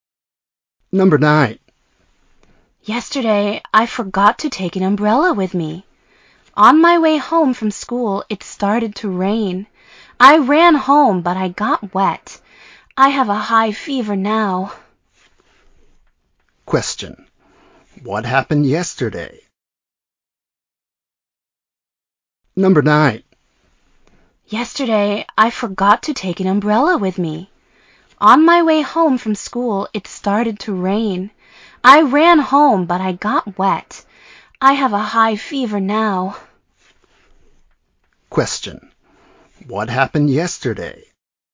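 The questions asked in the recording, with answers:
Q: What happened yesterday?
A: It rained on the way home and he got wet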